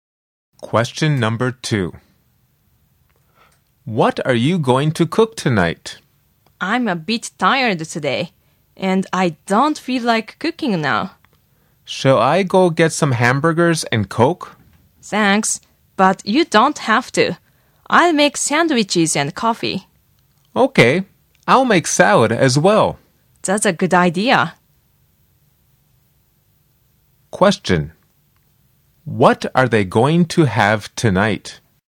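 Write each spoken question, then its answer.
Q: What are they going to have tonight?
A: Sandwiches, coffee and salad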